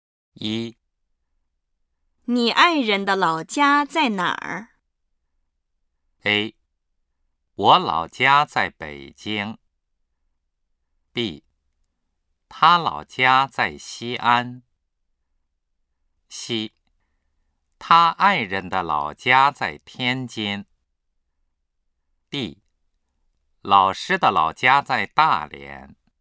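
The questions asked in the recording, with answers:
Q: 你爱人的老家在哪儿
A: B: 他老家在西安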